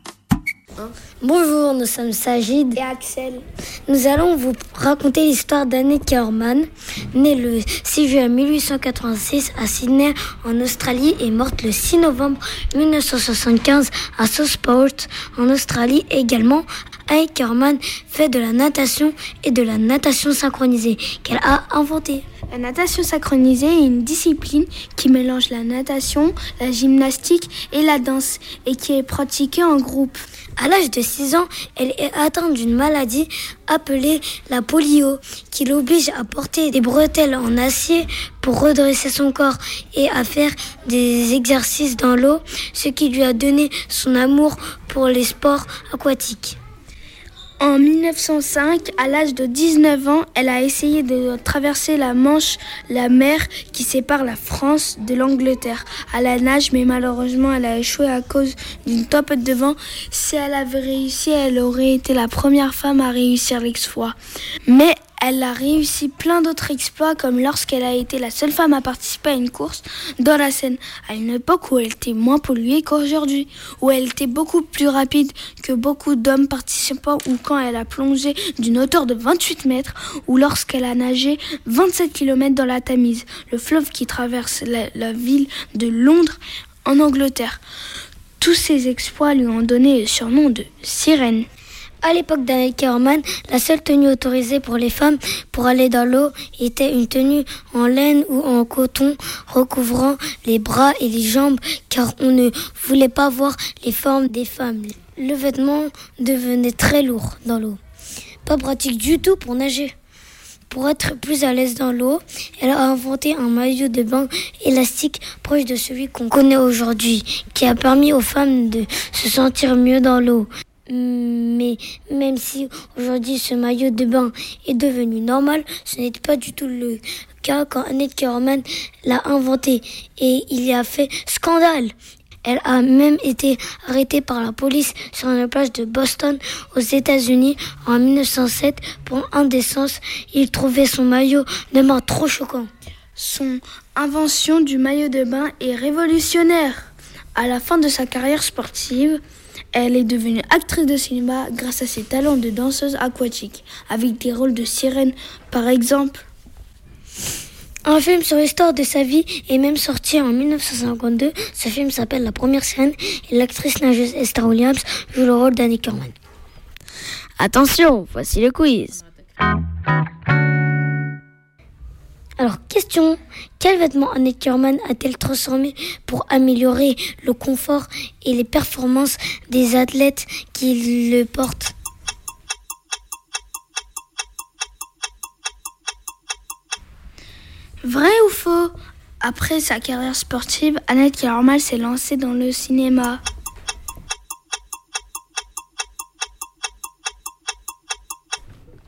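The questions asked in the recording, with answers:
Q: Alors, question, quel vêtement Annette Kaormann a-t-elle transformé pour améliorer le confort et les performances des athlètes qui le portent?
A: Le maillot de bain

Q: Vrai ou faux? Après sa carrière sportive, Annette Kaormann s'est lancée dans le cinéma.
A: Vrai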